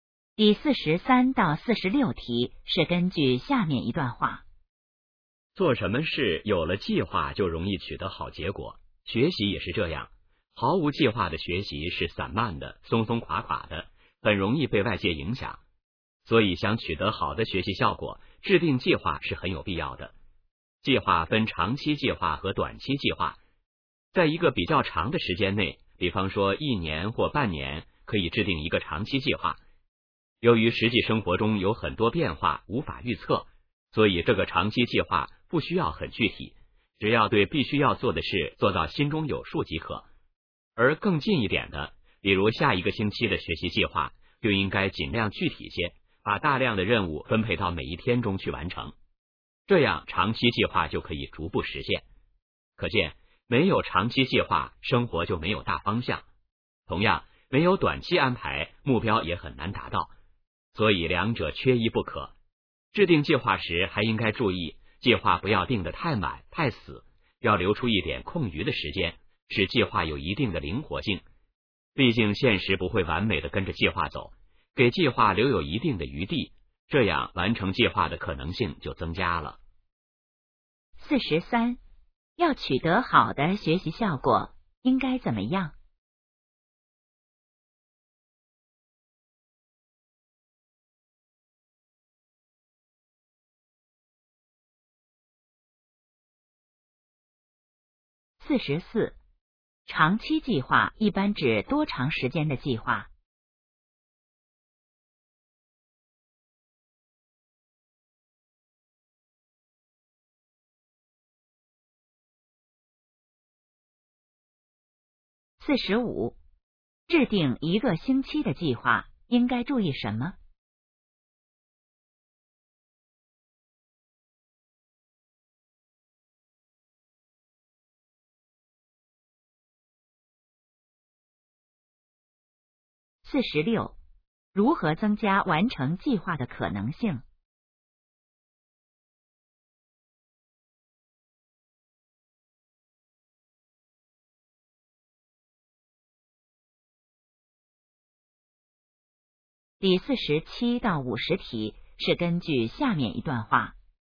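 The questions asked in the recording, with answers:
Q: 要取得好的学习效果,应该怎么样?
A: 制定计划

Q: 长期计划一般指多长时间的计划?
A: 一年或半年

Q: 制定一个星期的计划,应该注意什么?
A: 尽量具体

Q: 如何增加完成计划的可能性?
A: 留出一点空余时间,使计划灵活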